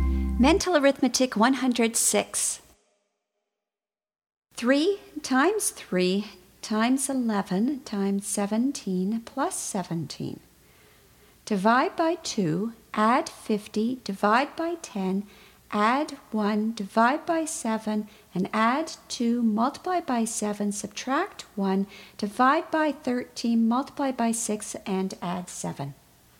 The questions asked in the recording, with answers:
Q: 3 times 3 times 11 times 17 plus 17. Divide by 2, add 50, divide by 10, add 1, divide by 7, and add 2, multiply by 7, subtract 1, divide by 13, multiply by 6, and add 7.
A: And the answer is 55.